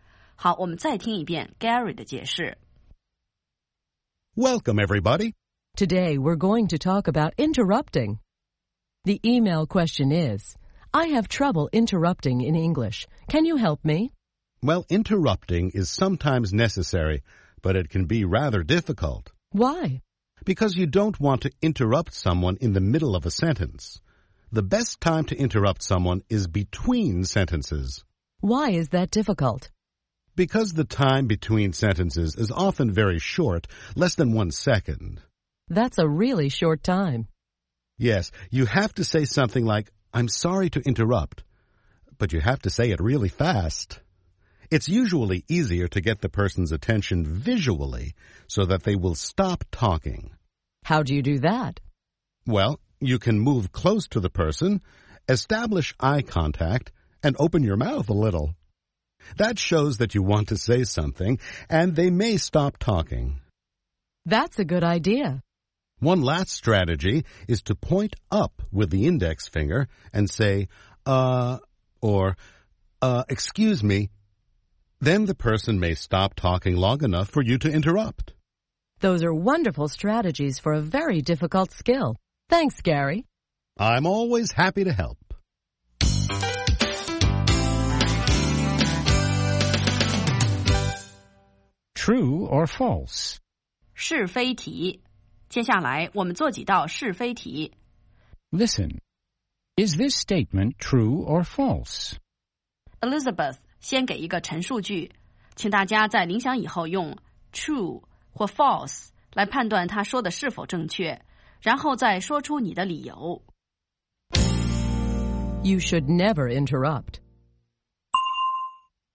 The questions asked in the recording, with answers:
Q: You should never interrupt.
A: False. Interrupting is sometimes necessary.